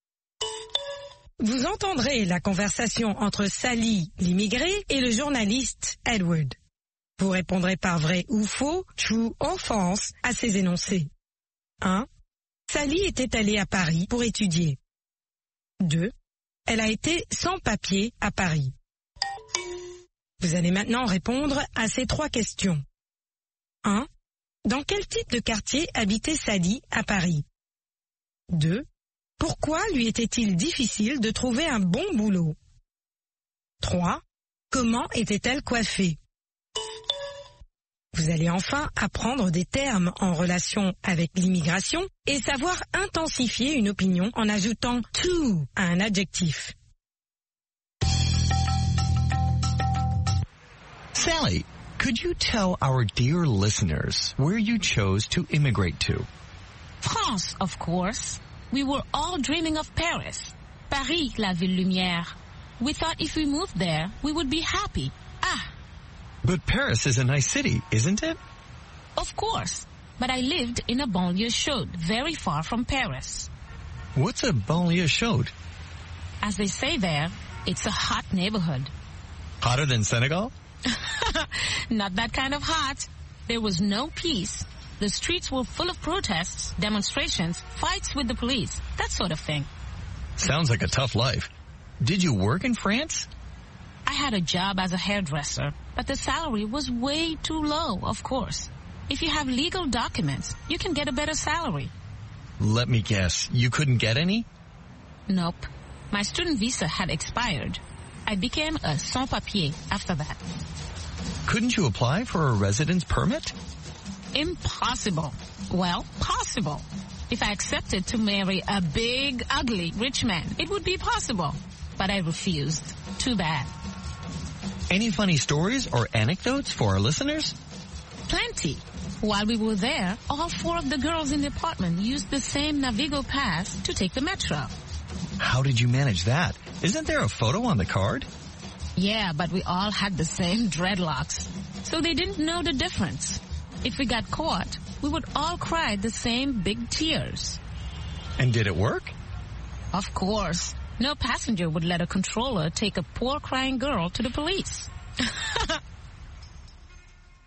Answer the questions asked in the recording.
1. L'énoncé 1 est vrai. Sally était allée à Paris pour étudier.
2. L'énoncé 2 est vrai. Elle a été sans papier à Paris.
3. Dans une banlieue chaude.
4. Elle était sans papier.
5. En dreadlocks.